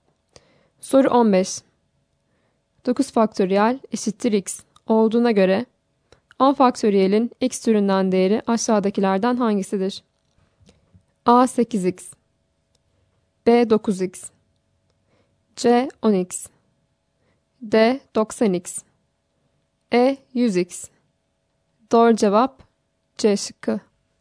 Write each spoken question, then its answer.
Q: 9 faktöriyel eşittir x olduğuna göre 10 faktöriyelin x türünden değeri aşağıdakilerden hangisidir?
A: Doğru cevap C şıkkı.